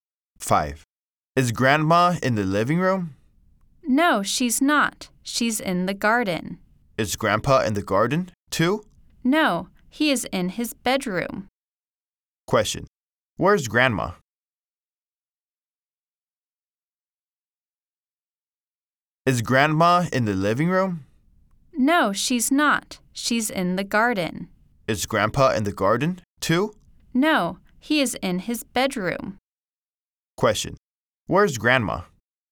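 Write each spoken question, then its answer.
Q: Where's Grandma?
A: In the garden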